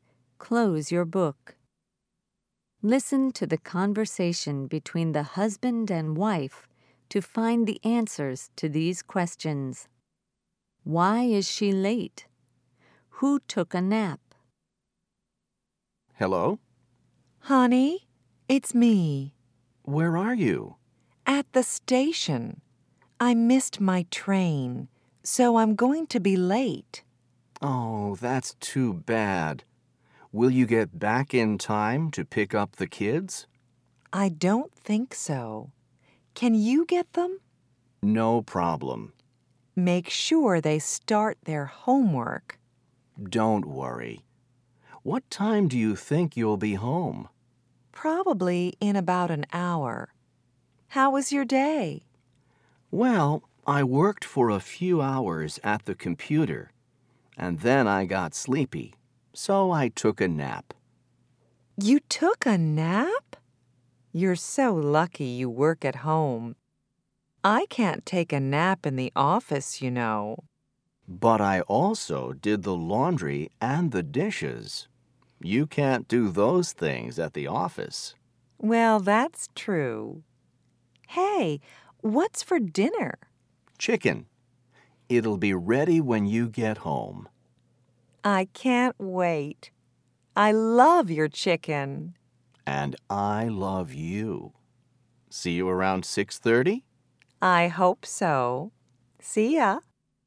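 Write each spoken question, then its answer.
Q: Why is she late?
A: She missed her train.

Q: Who took a nap?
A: The husband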